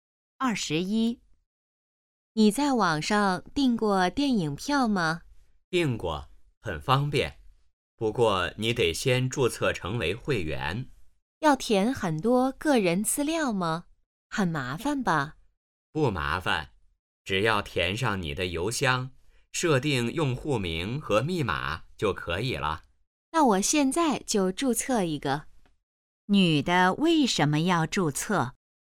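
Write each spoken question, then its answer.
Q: 女的为什么要注册?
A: 想在网上订电影票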